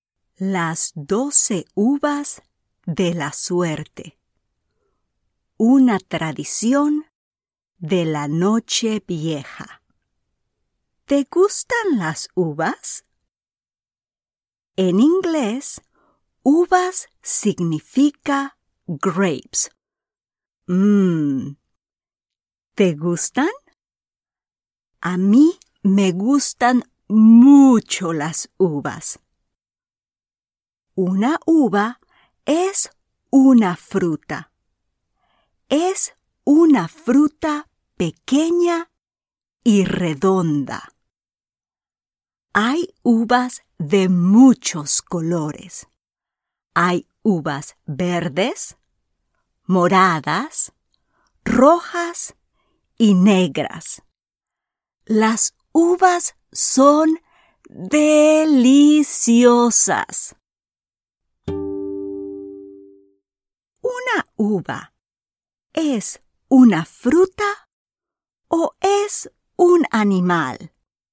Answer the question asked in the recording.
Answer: Sí, correcto. Una uva no es un animal.